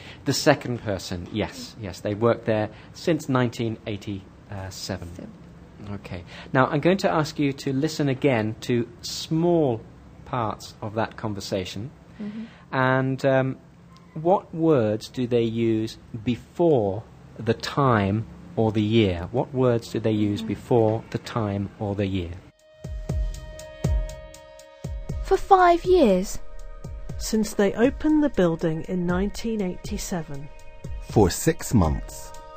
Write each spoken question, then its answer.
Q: And what words do they use before the time or the year?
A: For and since is the right answer